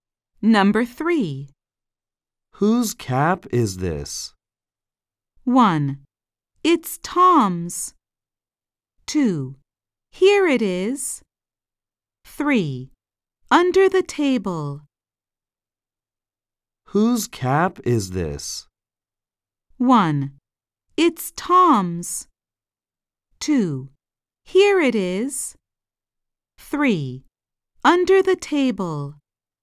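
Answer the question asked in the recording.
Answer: 1: It's Tom's.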